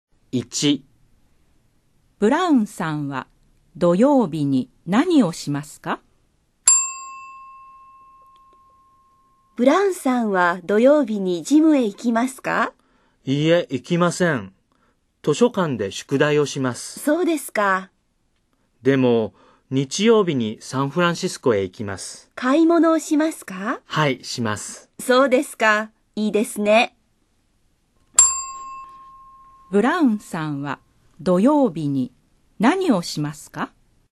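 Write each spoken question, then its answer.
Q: ブラウンさんは土曜日に何をしますか?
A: 図書館で宿題をします。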